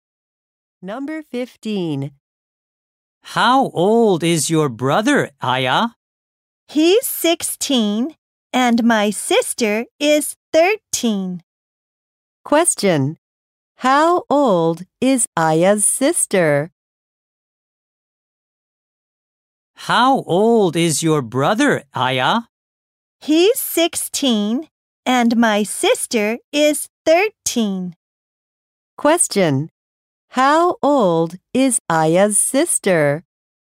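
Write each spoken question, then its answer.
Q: How old is Aya's sister?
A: 13 years old.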